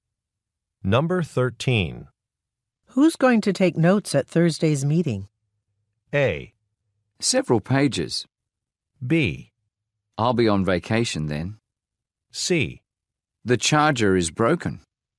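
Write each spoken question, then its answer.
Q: Who's going to take notes at Thursday's meeting?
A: B: I'll be on vacation then.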